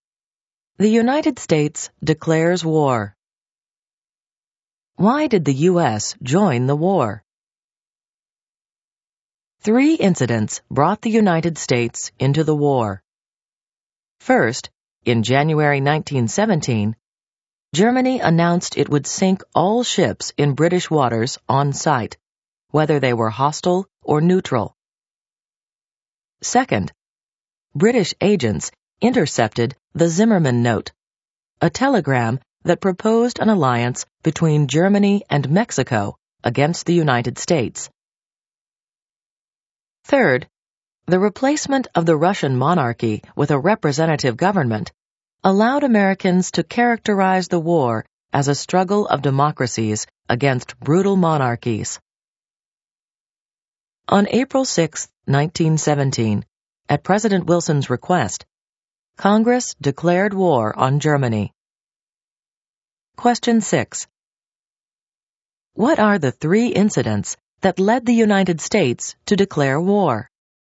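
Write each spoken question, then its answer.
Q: What are the three incidents that led the United States to declare war?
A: Germany's announcement that it would sink all ships in British waters, the Zimmermann Note, and the replacement of the Russian monarchy with a representative government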